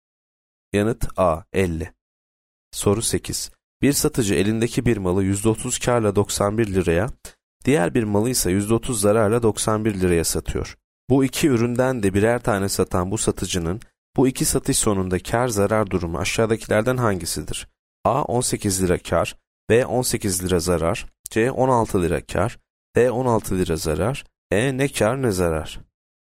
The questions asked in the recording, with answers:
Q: Bu iki üründen de birer tane satan bu satıcının bu iki satış sonunda kâr zarar durumu aşağıdakilerden hangisidir?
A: B 18 lira zarar.